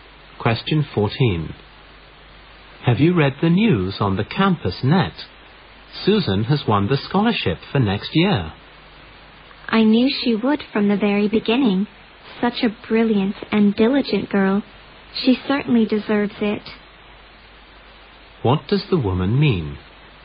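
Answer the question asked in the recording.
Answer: Susan deserves the scholarship; she expected her to win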